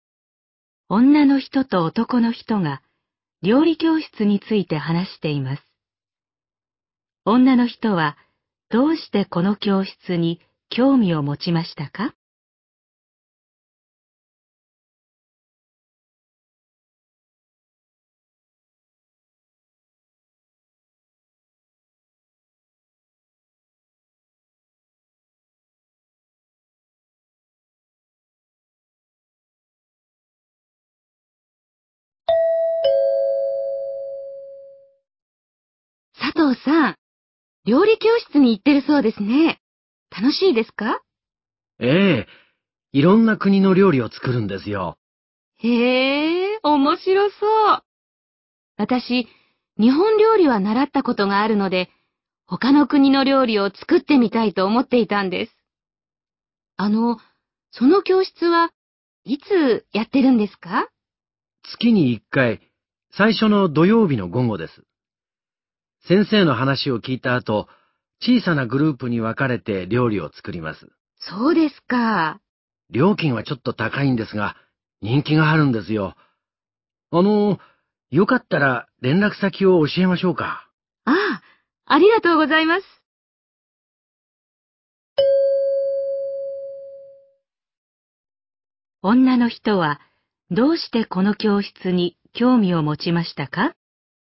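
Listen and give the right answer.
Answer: 日本料理以外の、他の国の料理を作ってみたいと思っていたから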